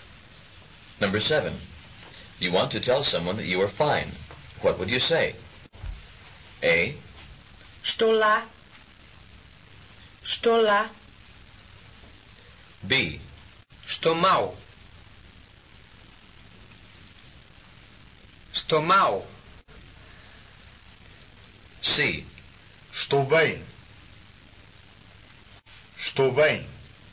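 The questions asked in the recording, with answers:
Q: You want to tell someone that you are fine.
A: C: Estou bem.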